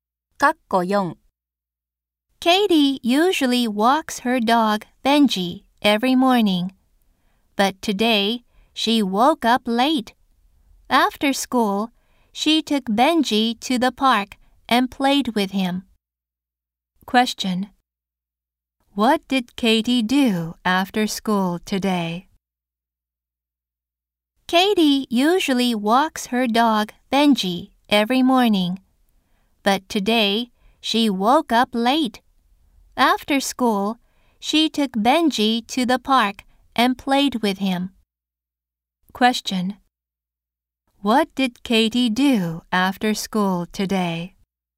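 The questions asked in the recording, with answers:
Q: What did Katie do after school today?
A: She took Benji to the park and played with him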